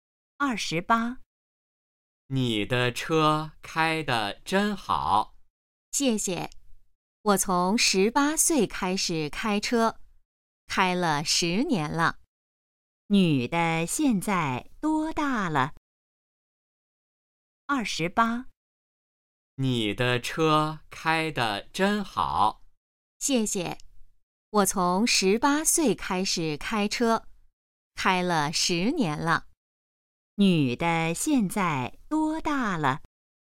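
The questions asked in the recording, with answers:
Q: 女的现在多大了?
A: 28岁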